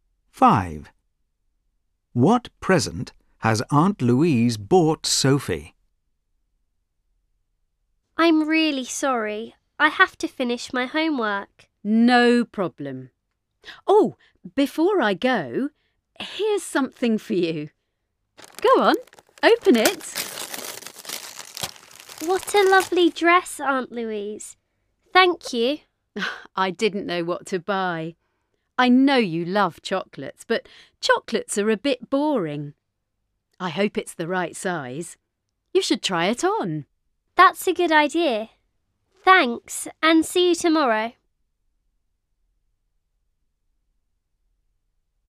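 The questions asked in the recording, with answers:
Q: What present has Aunt Louise bought Sophie?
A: a dress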